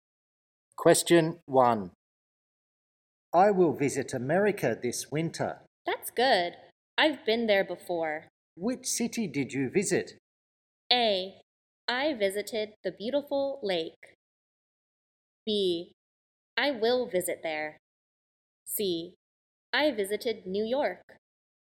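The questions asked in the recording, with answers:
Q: Which city did you visit?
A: C: I visited New York.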